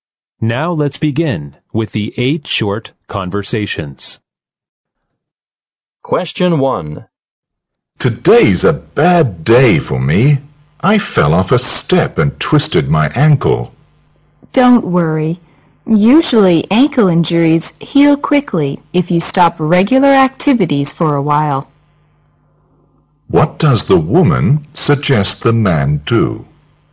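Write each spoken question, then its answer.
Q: What does the woman suggest the man do?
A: Stop his regular activities for a while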